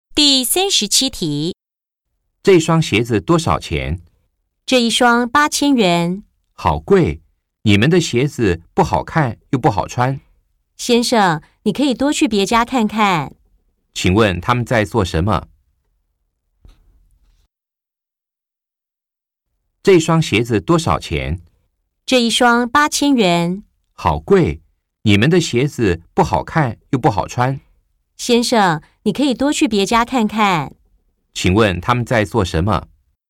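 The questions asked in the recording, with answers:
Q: 请问他们在做什么?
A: 在买鞋子(问鞋子的价钱)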